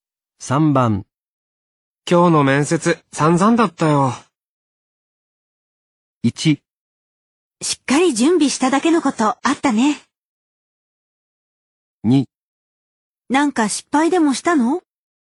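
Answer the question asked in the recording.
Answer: 2: なんか失敗でもしたの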